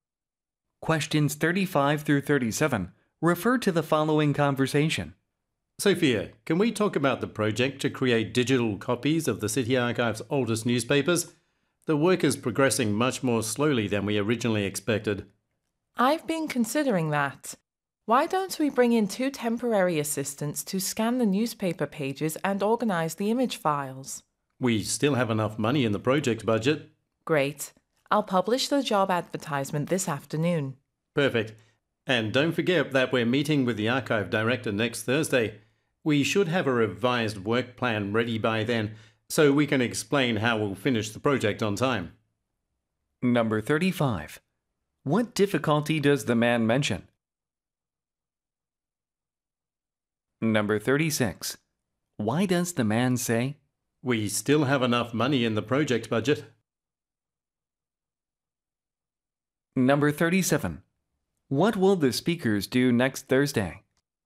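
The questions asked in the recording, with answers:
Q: What difficulty does the man mention?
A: The project is progressing more slowly than expected

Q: Why does the man say, "We still have enough money in the project budget"?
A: To show that they can afford to hire two temporary assistants

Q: What will the speakers do next Thursday?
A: Meet with the archive director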